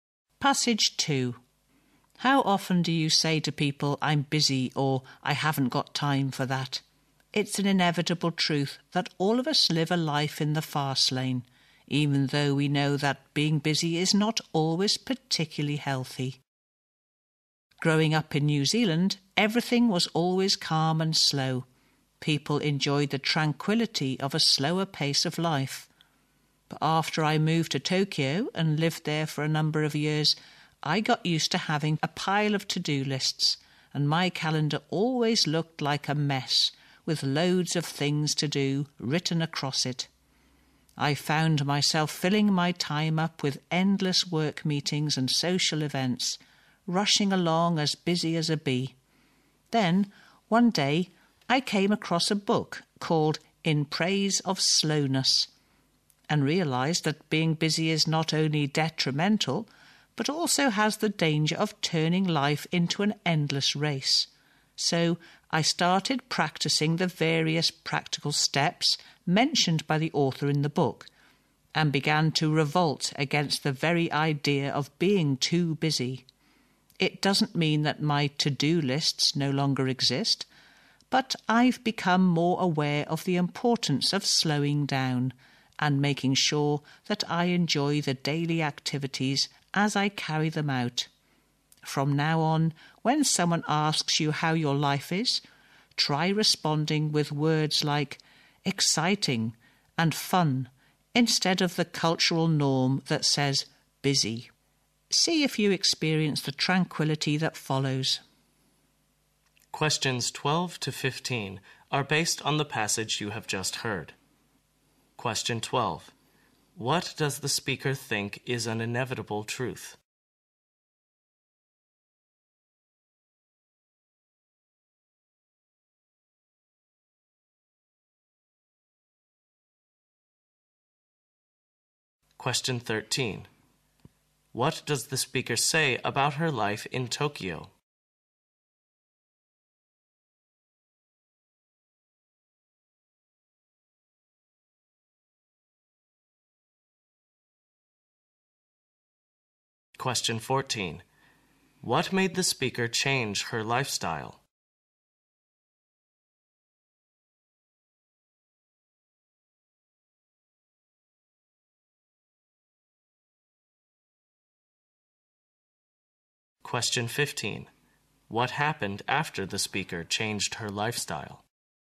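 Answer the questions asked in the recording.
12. All of us live a life in the fast lane
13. She was always busy with to-do lists, work meetings and social events
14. Reading the book In Praise of Slowness
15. She became more aware of slowing down and enjoying daily activities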